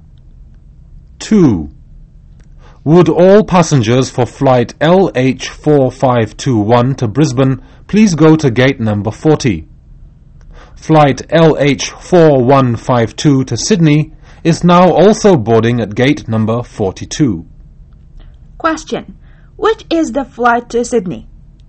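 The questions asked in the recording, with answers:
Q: Which is the flight to Sydney?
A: LH4152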